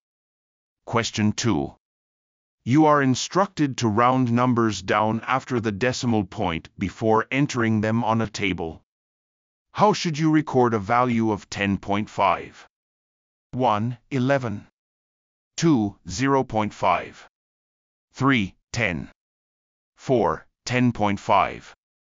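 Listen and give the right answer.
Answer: 3: 10.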